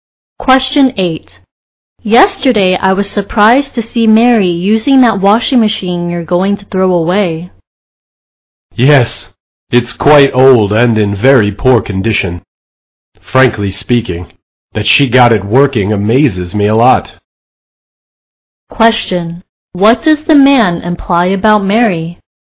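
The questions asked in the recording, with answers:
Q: What does the man imply about Mary?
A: He is amazed she got the old washing machine working.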